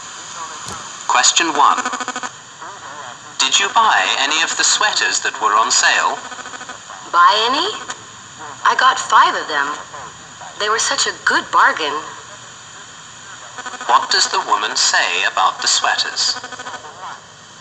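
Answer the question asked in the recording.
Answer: She bought five because they were a good bargain.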